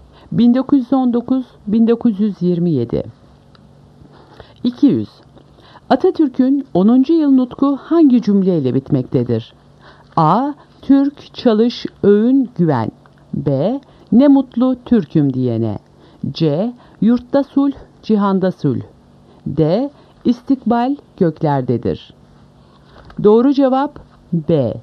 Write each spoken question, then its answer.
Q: yıl nutku hangi cümleyle bitmektedir?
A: Doğru cevap B. Ne mutlu Türk'üm diyene.